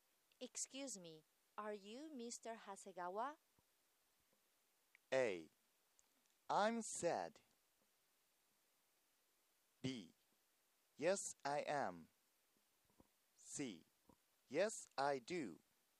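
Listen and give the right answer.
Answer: B: Yes, I am.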